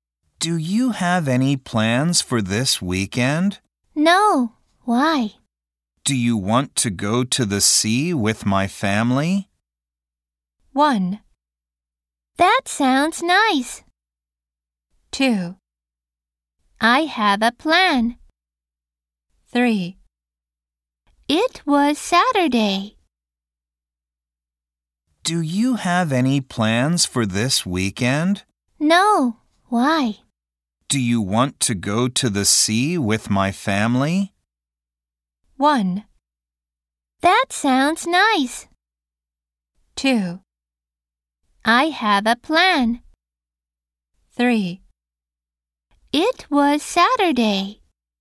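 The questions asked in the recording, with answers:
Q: Do you want to go to the sea with my family?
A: 1: That sounds nice.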